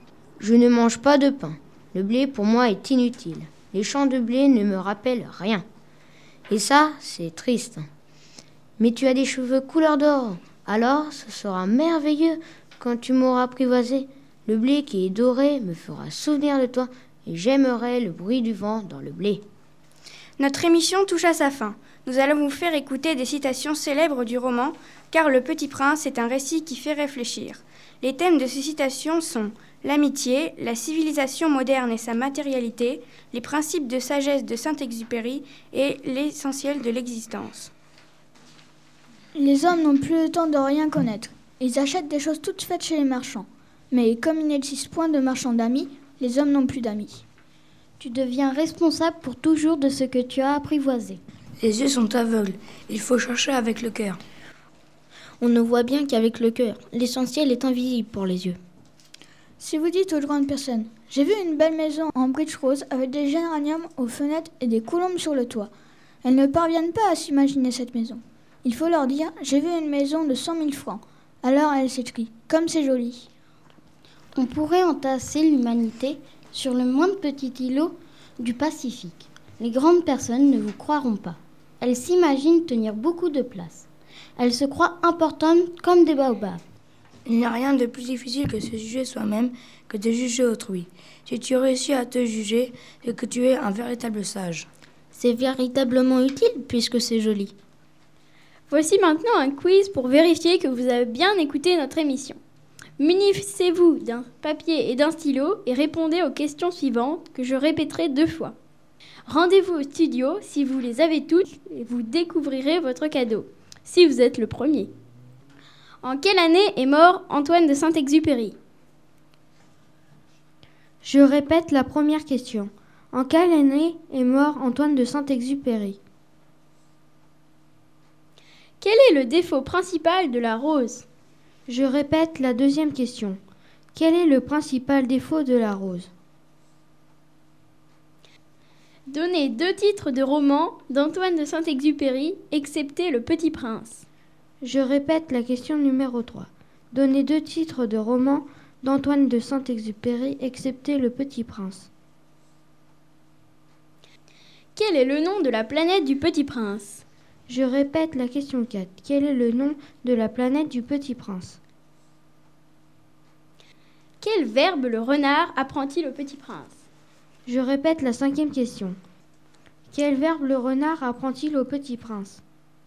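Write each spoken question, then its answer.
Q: Quel verbe le renard apprend-il au Petit Prince ?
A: Apprivoiser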